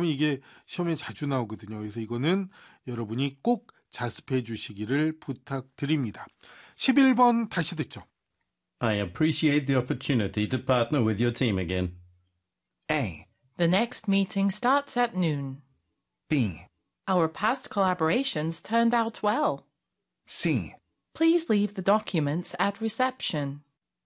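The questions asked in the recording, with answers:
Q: I appreciate the opportunity to partner with your team again.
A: B: Our past collaborations turned out well.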